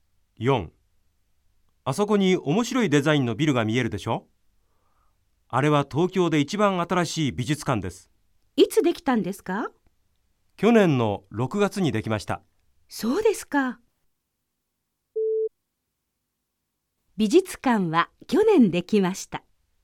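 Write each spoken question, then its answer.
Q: 美術館は去年できました。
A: ○(正しい)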